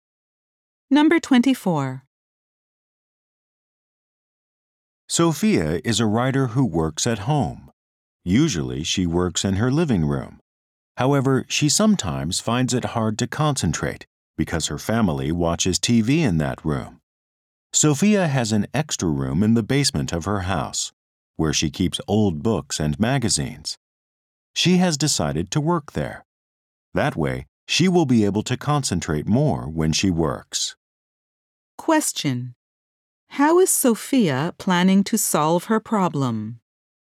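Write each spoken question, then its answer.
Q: How is Sophia planning to solve her problem?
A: By working in the extra room in her basement.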